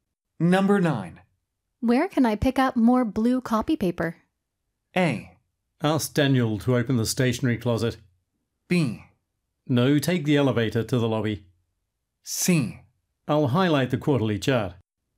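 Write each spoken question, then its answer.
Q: Where can I pick up more blue copy paper?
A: A: Ask Daniel to open the stationery closet.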